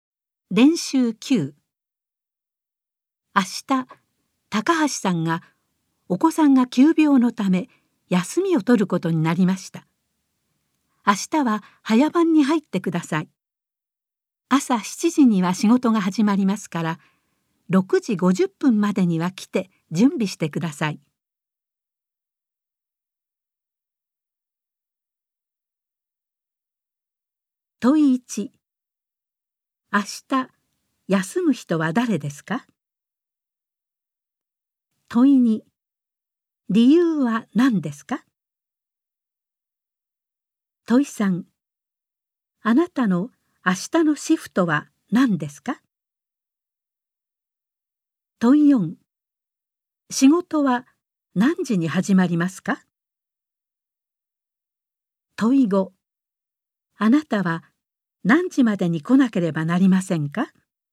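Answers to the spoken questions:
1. 高橋さん
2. お子さんが急病のため
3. 早番
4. 朝7時
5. 6時50分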